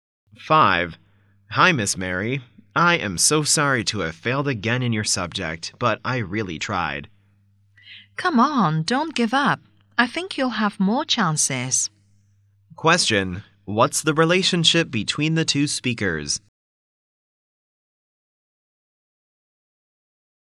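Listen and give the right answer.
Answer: Teacher and student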